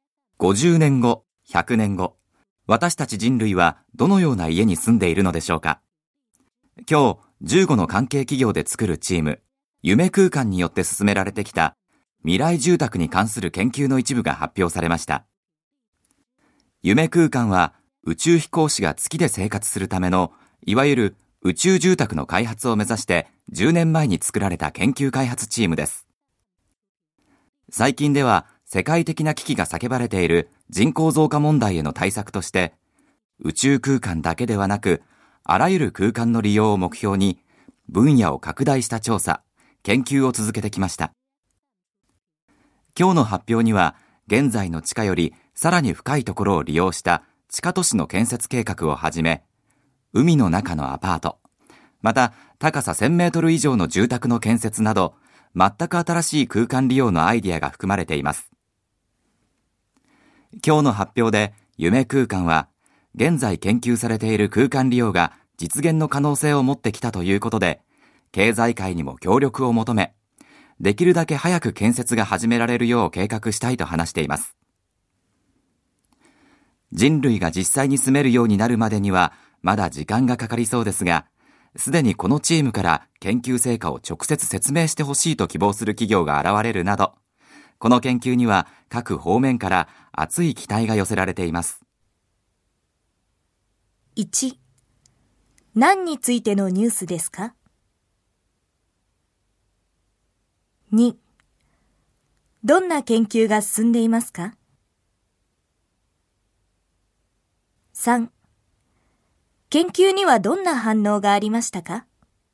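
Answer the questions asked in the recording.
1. 夢空間による未来住宅の研究の一部の発表
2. 宇宙だけでなく地下都市、海の中のアパート、高さ1000メートル以上の住宅など、あらゆる空間を利用する住宅の研究
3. 各方面から熱い期待が寄せられ、研究成果を直接説明してほしいと希望する企業も現れた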